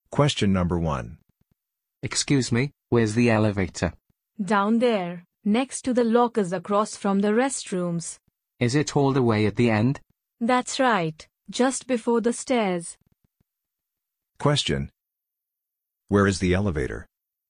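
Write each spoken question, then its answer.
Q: Where is the elevator?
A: At the end, next to the lockers, across from the restrooms, just before the stairs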